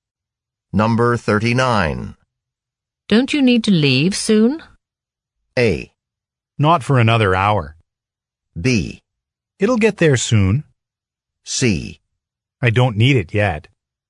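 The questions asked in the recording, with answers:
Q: Don't you need to leave soon?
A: A: Not for another hour.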